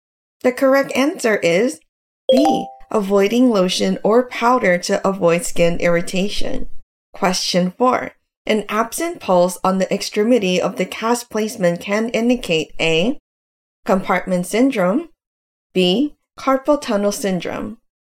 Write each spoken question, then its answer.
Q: An absent pulse on the extremity of the cast placement can indicate A, compartment syndrome, B, carpal tunnel syndrome.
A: The correct answer is A, compartment syndrome.